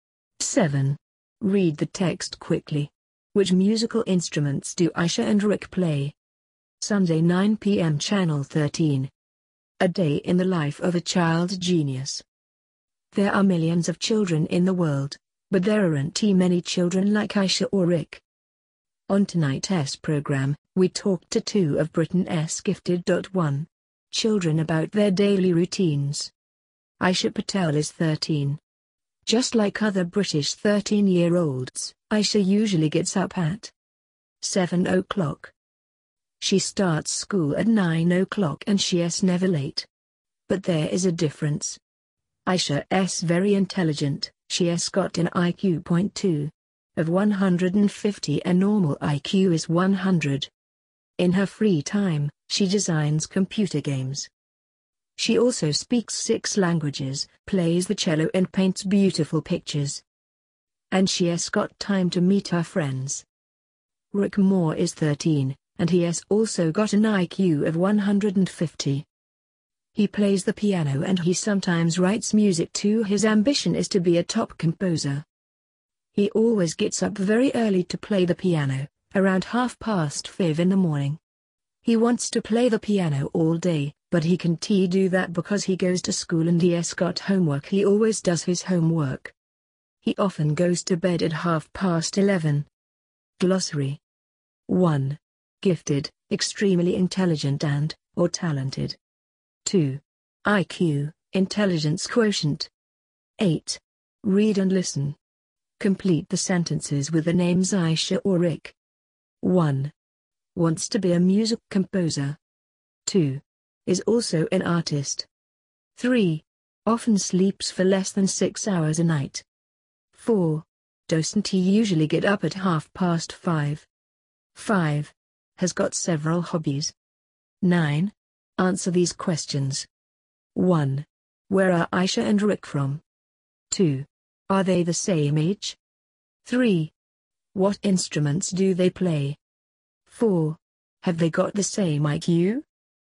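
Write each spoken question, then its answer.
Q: Which musical instruments do Aisha and Rick play?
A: Aisha plays the cello; Rick plays the piano

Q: Wants to be a music composer.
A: Rick

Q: Is also an artist.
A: Aisha

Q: Often sleeps for less than 6 hours a night.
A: Rick

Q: Has got several hobbies.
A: Aisha

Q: Where are Aisha and Rick from?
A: Britain

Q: Are they the same age?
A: Yes, they are both 13

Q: What instruments do they play?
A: Aisha plays the cello and Rick plays the piano

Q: Have they got the same IQ?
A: Yes, 150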